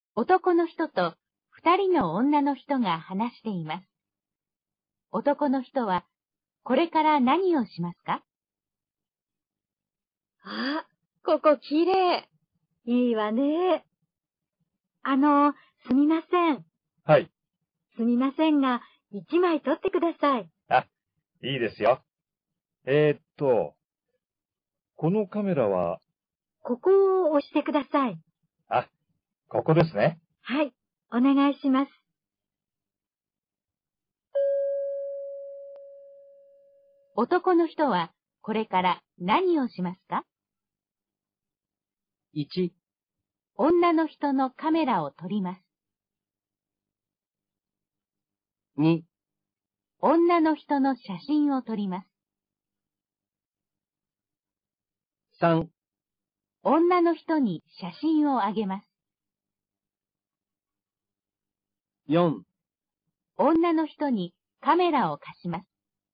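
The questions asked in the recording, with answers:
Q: 男の人はこれから何をしますか?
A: 2: 女の人の写真を撮ります。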